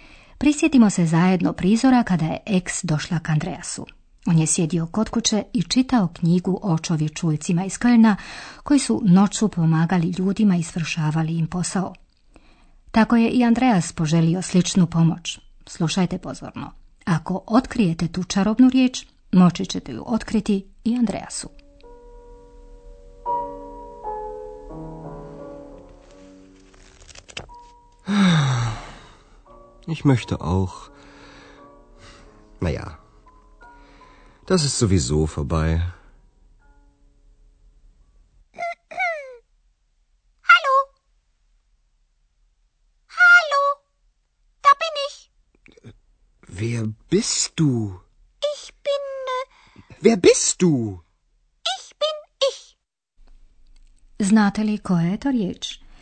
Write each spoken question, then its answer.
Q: Znate li koja je to riječ?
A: Sowieso. Sowieso. Sowieso.